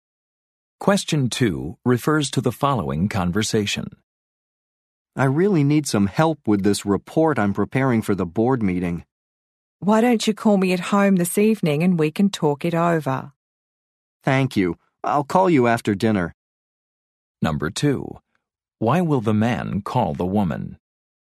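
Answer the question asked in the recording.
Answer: To get help with his report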